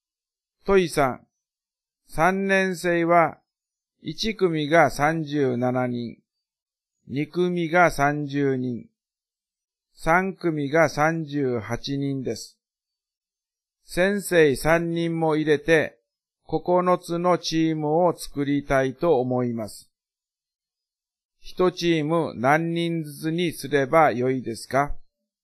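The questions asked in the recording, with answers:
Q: 1チーム何人ずつにすればよいですか?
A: 12人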